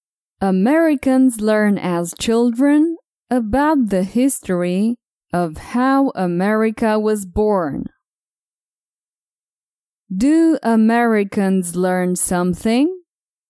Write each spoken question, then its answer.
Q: Do Americans learn something?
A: Yes, they learn about the history of America.